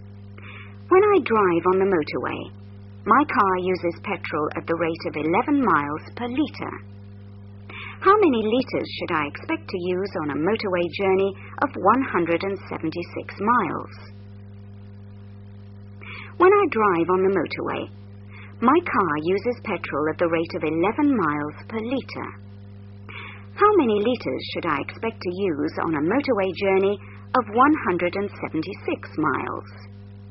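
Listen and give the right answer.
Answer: 16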